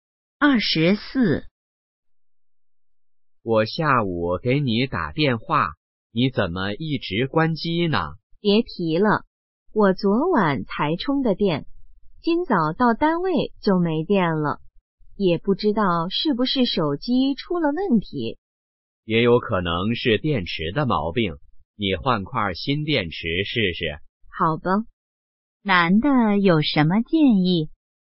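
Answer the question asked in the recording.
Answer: 换块新电池试试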